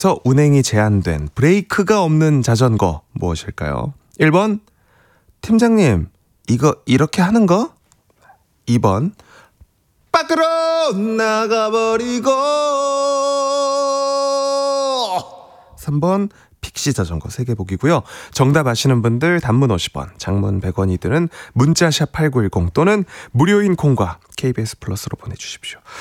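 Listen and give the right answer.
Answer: 3: 픽시 자전거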